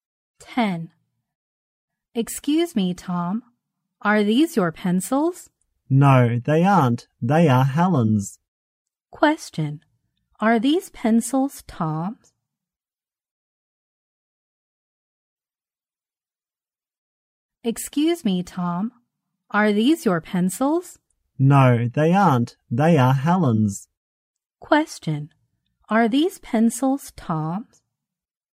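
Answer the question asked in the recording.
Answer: No, they are Helen's.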